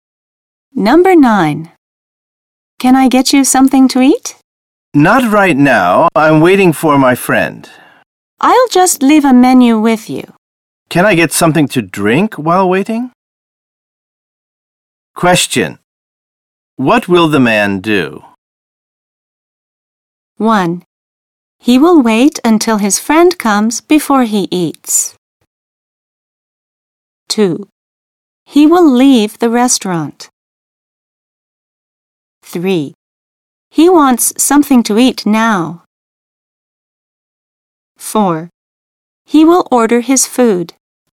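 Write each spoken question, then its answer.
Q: What will the man do?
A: 1: He will wait until his friend comes before he eats.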